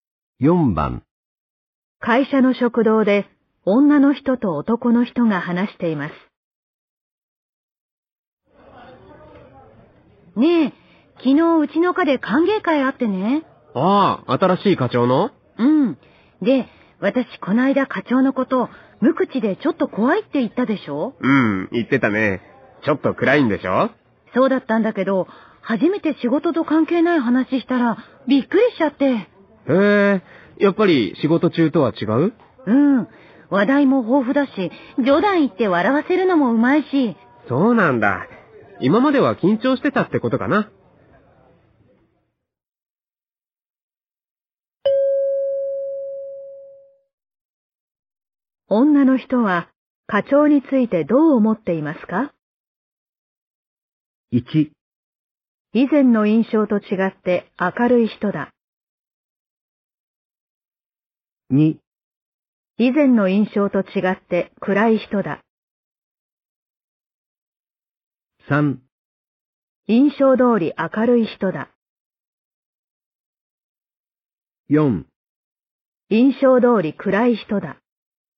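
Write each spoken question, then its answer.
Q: 女の人は課長についてどう思っていますか?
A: 1: 以前の印象と違って明るい人だ。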